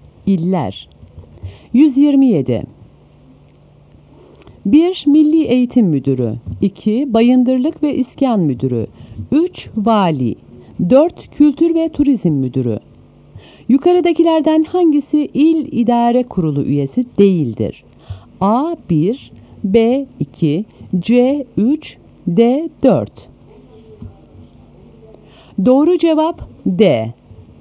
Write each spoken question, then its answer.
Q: Yukarıdakilerden hangisi il idare kurulu üyesi değildir?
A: Doğru cevap D.